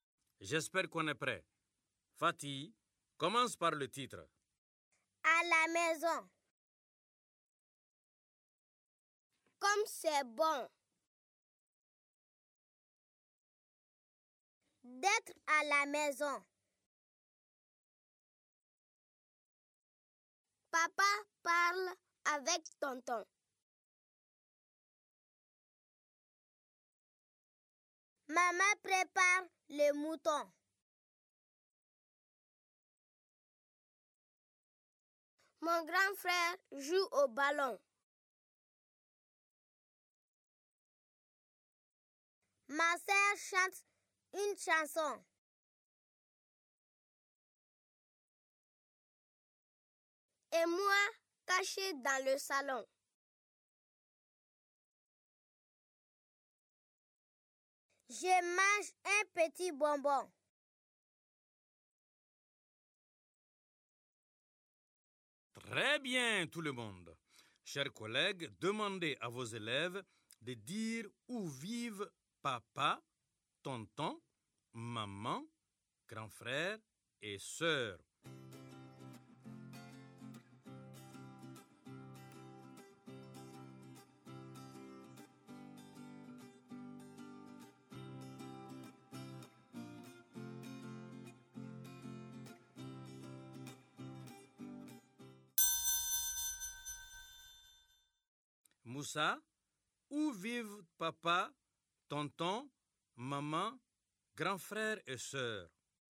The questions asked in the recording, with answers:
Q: Moussa, où vivent papa, tonton, maman, grand frère et sœur?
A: À la maison, monsieur.